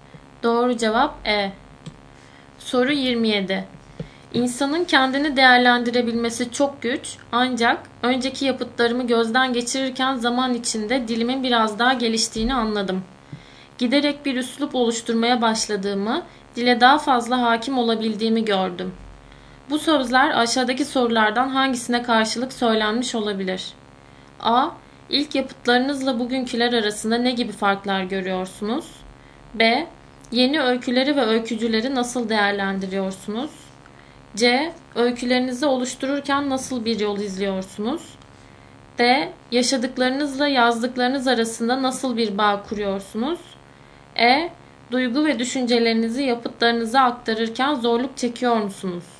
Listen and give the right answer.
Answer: Doğru cevap A.